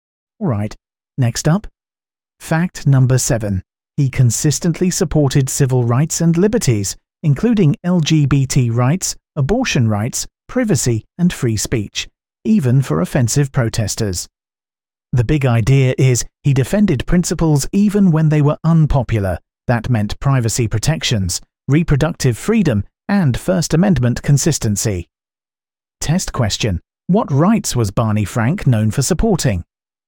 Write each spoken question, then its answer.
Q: what rights was Barney Frank known for supporting?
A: civil rights and liberties